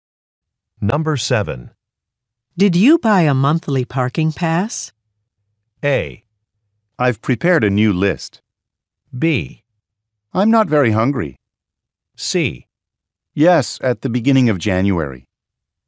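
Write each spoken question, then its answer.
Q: Did you buy a monthly parking pass?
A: C: Yes, at the beginning of January.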